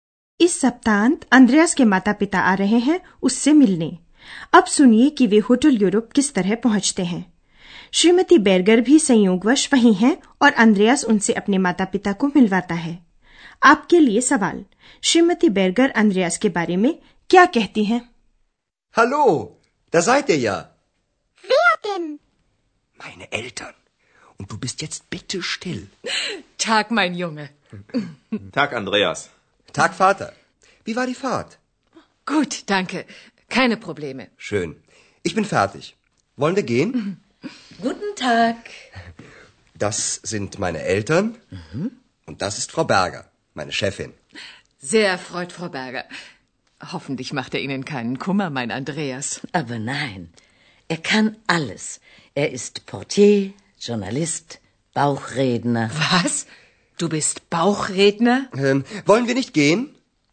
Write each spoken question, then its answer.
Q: आपके लिए सवाल श्रीमती बैरगर अंद्रयास के बारे में क्या कहती हैं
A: वे अंद्रयास की तारीफ करती हैं वे गिनाती हैं कि अंद्रयास को क्या क्या आता है वो एक porter है पत्रकार है और पेट बोला है